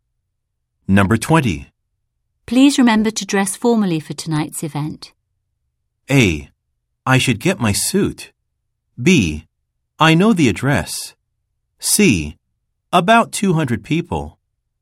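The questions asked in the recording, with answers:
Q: Please remember to dress formally for tonight's event.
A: A: I should get my suit.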